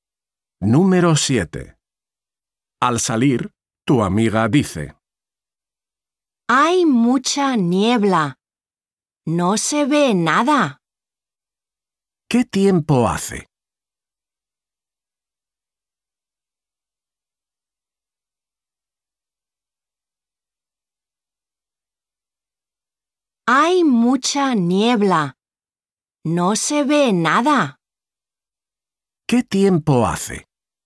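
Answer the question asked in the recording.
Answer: hay mucha niebla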